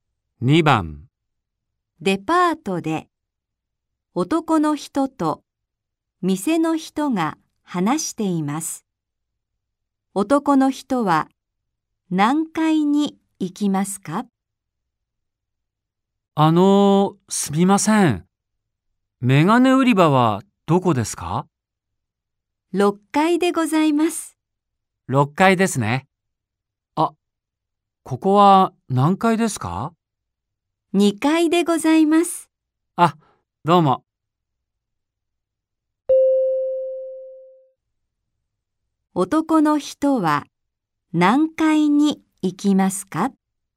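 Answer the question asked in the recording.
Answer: 6階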